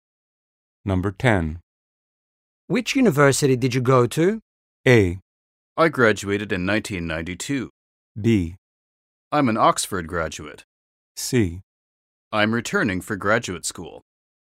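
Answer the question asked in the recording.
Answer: B: I'm an Oxford graduate.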